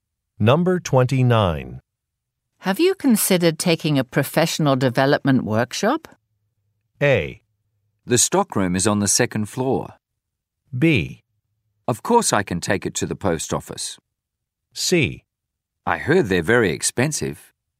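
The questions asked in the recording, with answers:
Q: Have you considered taking a professional development workshop?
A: C: I heard they're very expensive.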